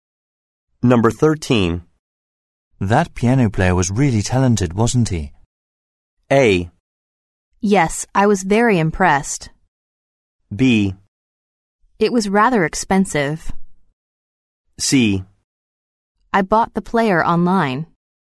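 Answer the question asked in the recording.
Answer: A: Yes, I was very impressed.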